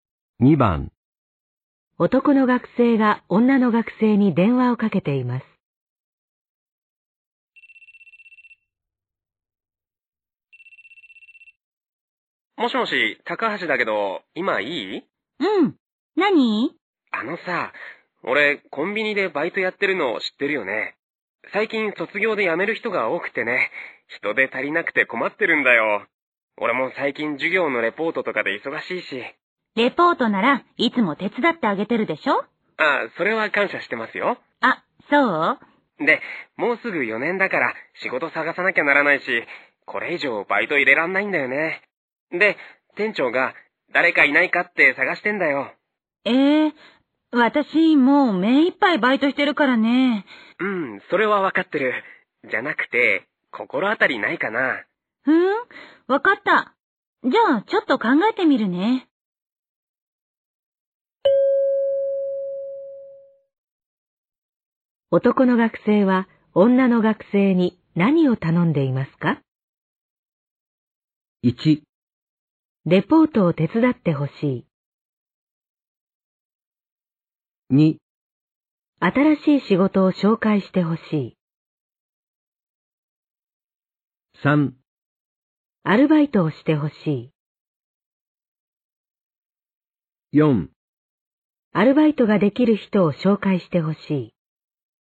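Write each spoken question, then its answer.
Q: 男の学生は女の学生に何を頼んでいますか?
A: 4: アルバイトができる人を紹介してほしい。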